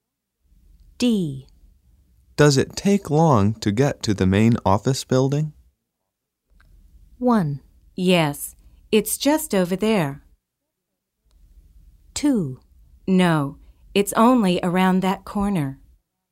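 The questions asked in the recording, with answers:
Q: Does it take long to get to the main office building?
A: 2: No, it's only around that corner.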